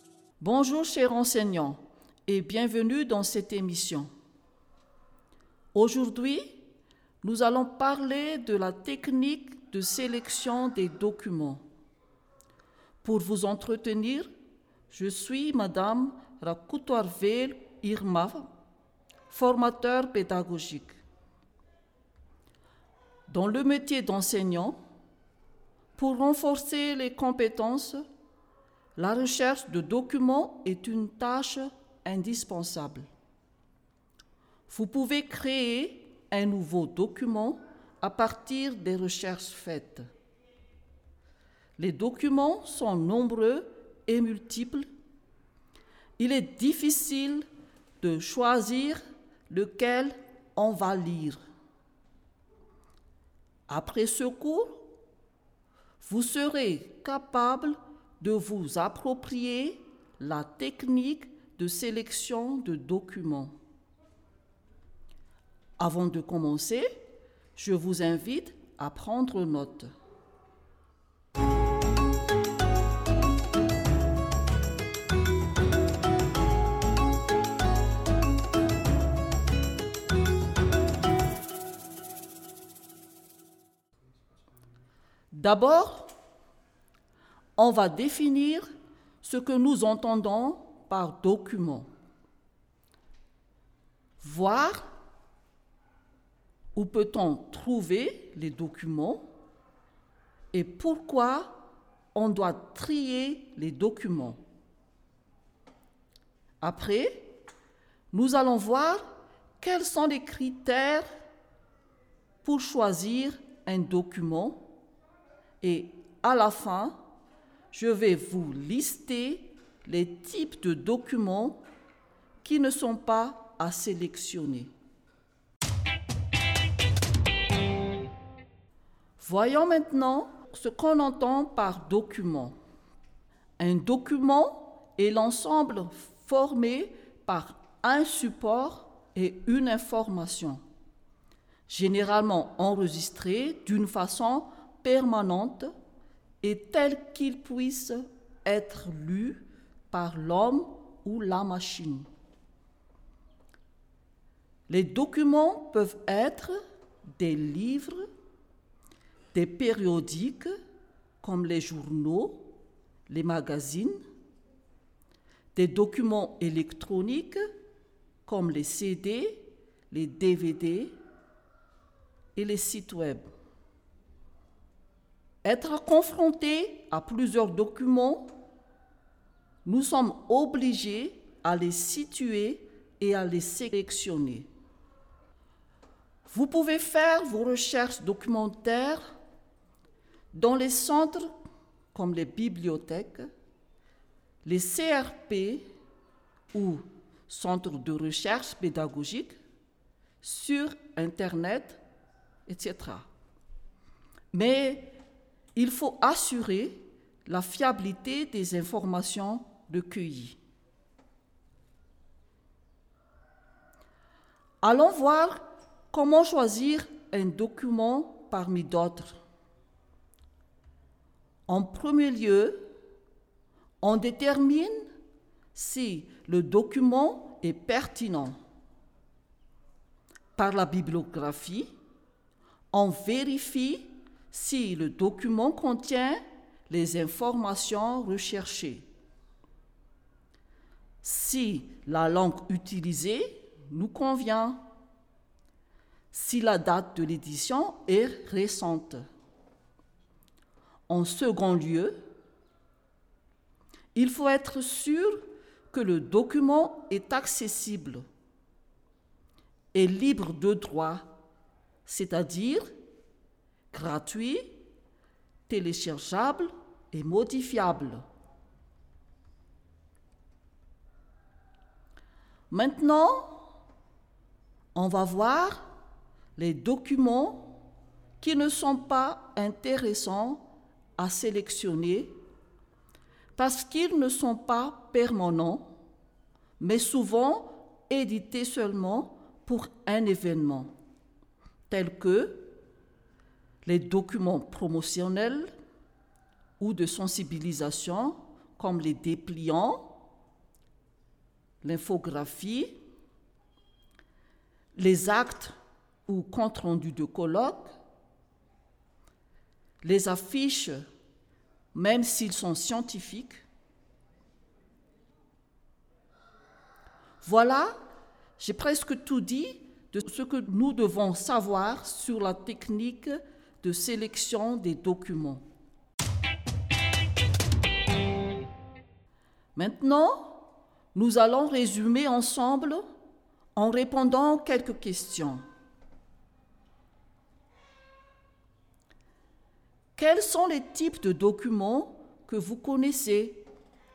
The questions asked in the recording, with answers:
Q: Quels sont les types de documents que vous connaissez?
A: Il y a les livres, les périodiques comme les journaux, les magazines, les documents électroniques comme les CD, les DVD, les sites web.